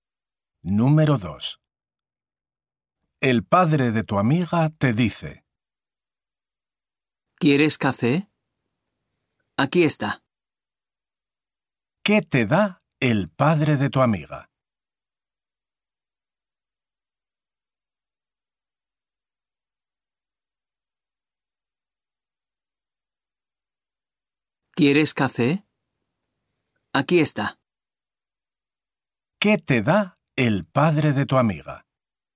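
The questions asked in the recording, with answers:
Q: ¿Qué te da el padre de tu amiga?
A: café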